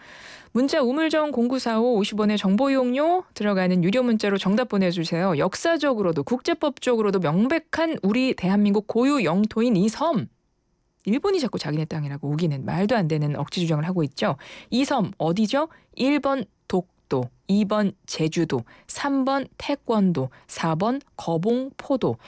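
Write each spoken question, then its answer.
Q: 이 섬 어디죠?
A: 1번 독도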